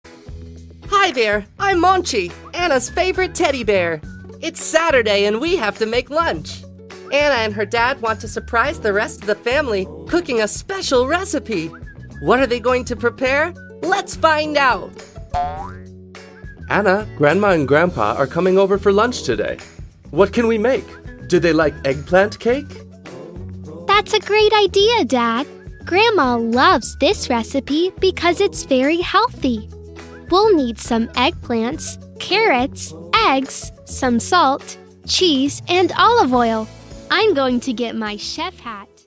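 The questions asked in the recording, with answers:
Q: What are they going to prepare?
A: An eggplant cake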